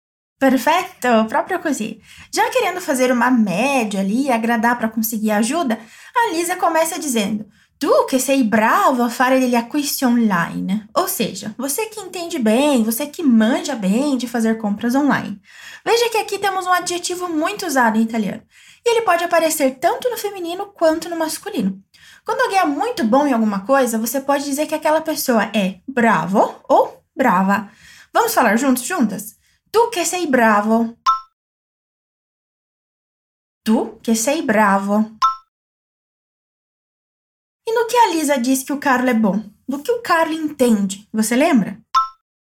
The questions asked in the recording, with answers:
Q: E no que a Lisa diz que o Carlo é bom? Do que o Carlo entende? Você lembra?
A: A fare degli acquisti online.